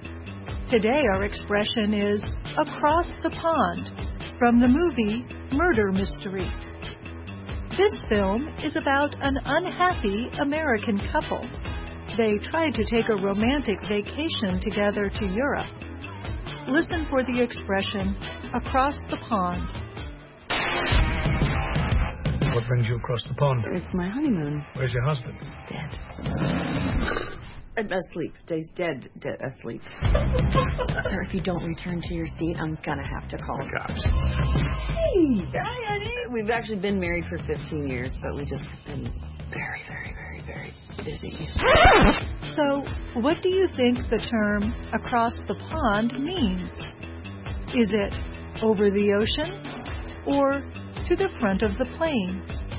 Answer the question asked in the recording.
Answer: Across the pond means over the ocean.